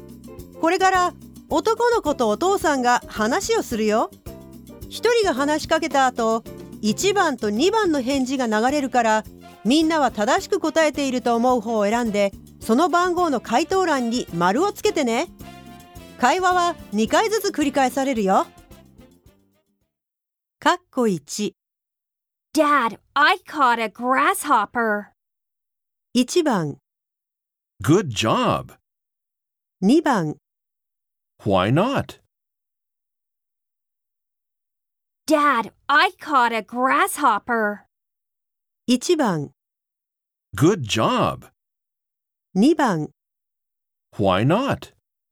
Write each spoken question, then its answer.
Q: Dad, I caught a grasshopper.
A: 答えは1番の Good job!